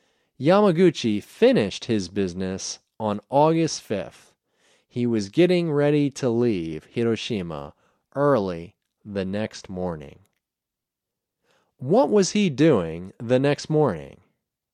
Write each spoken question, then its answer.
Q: What was he doing the next morning?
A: He was getting ready to leave Hiroshima the next morning.